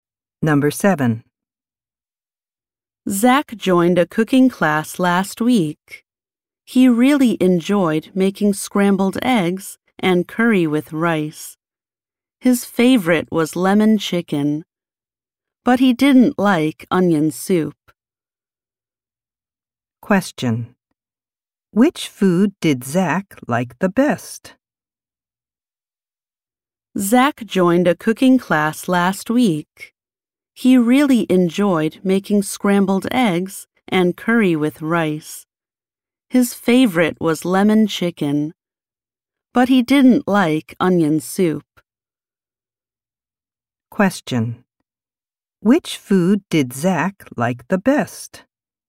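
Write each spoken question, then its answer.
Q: Which food did Zach like the best?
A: Lemon chicken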